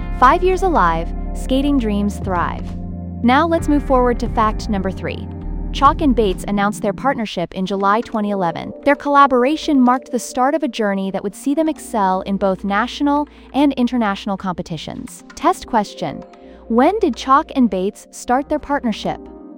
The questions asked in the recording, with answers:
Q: When did Chalk and Bates start their partnership?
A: Correct answer. July 2011.